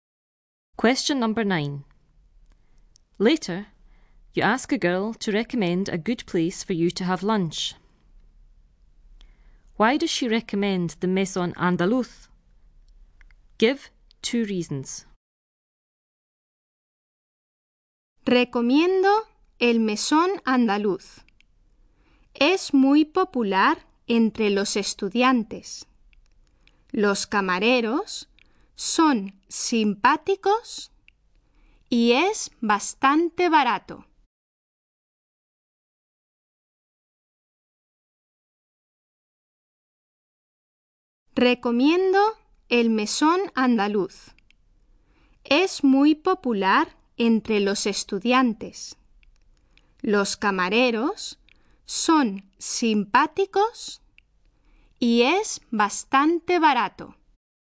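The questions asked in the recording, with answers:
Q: Why does she recommend the Maison Andaluz?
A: Any two of: it is very popular with students, the waiters are friendly, it is quite cheap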